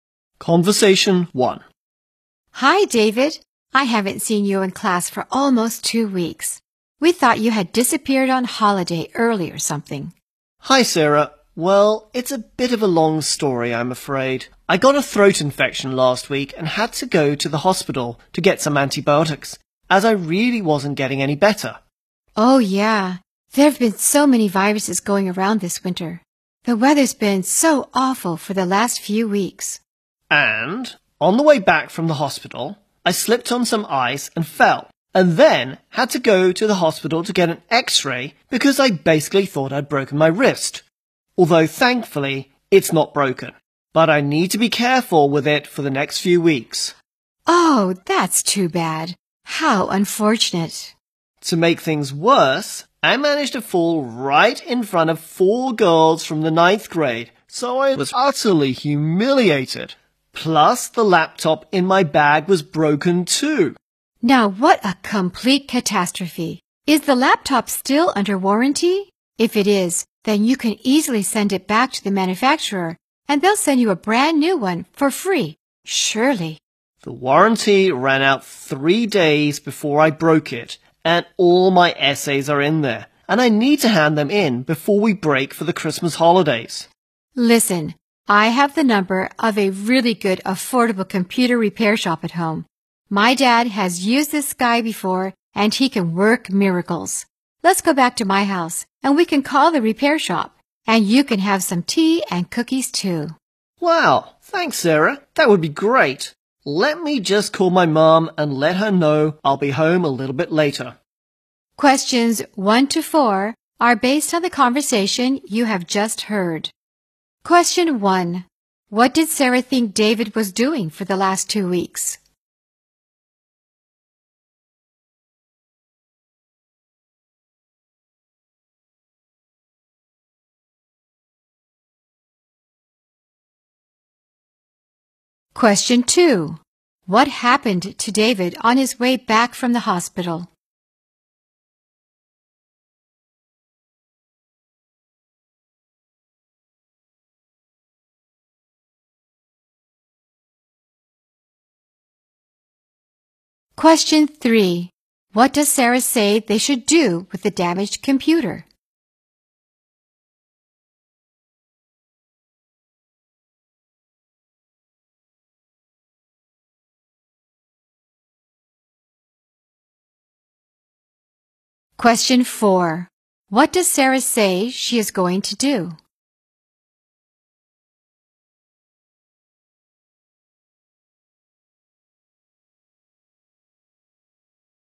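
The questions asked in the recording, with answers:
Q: What did Sarah think David was doing for the last 2 weeks?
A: That he had disappeared on holiday early.

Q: What happened to David on his way back from the hospital?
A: He slipped on some ice and fell, and had to go to the hospital for an x-ray of his wrist.

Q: What does Sarah say they should do with the damaged computer?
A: Call a good, affordable computer repair shop.

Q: What does Sarah say she is going to do?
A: Take David back to her house to call the repair shop and have tea and cookies.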